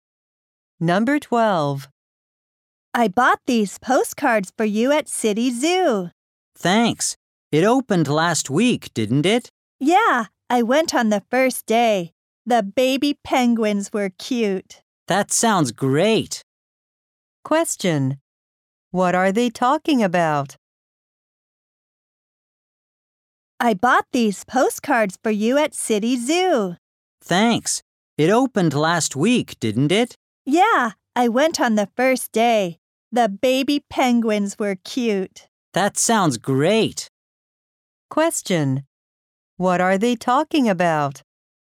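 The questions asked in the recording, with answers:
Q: What are they talking about?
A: The new City Zoo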